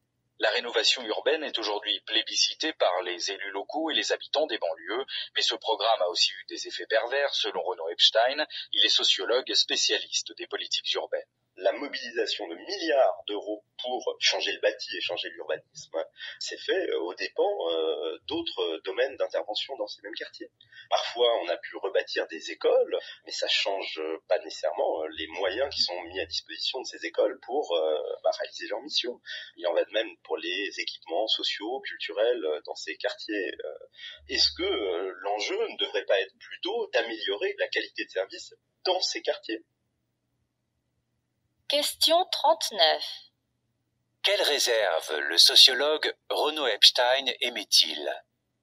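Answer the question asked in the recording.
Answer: Les milliards investis dans le bâti et l'urbanisme l'ont été aux dépens d'autres interventions, comme la qualité des services (écoles, équipements sociaux et culturels)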